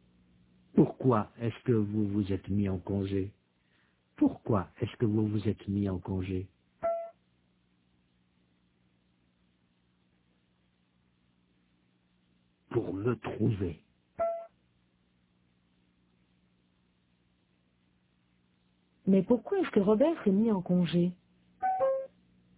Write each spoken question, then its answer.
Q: Mais pourquoi est-ce que Robert s'est mis en congé?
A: Pour se trouver.